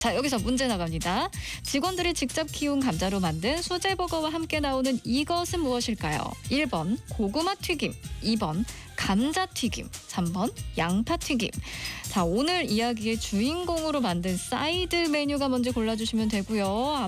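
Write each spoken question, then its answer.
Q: 직원들이 직접 키운 감자로 만든 수제버거와 함께 나오는 이것은 무엇일까요?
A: 2: 감자튀김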